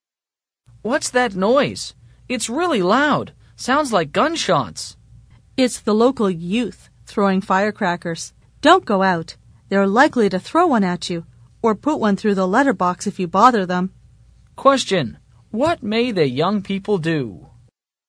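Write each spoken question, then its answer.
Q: what may the young people do?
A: Throw a firecracker at you or put one through the letterbox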